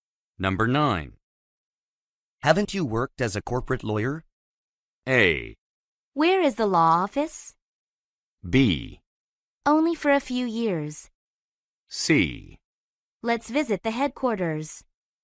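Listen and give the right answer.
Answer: B: Only for a few years.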